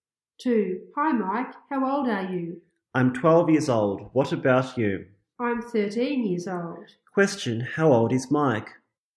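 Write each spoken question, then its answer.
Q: How old is Mike?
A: 12 years old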